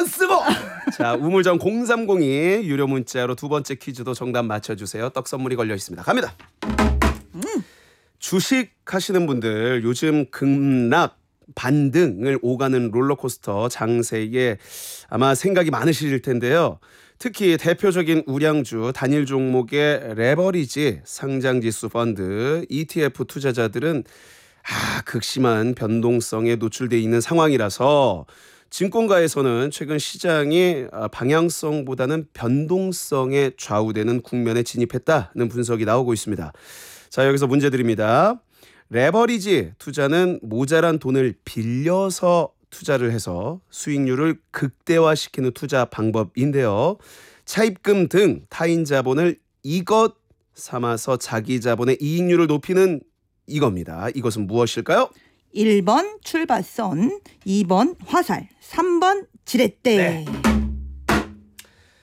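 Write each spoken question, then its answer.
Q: 이것은 무엇일까요?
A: 3: 지렛대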